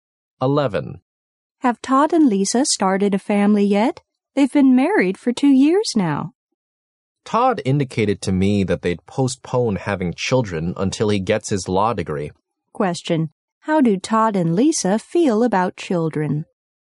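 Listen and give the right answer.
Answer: They want to wait until Todd gets his law degree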